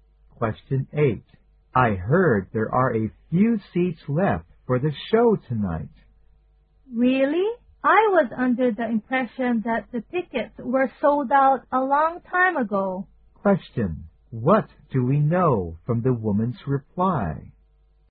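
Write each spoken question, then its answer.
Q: What do we know from the woman's reply?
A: She is surprised; she thought the tickets had been sold out long ago.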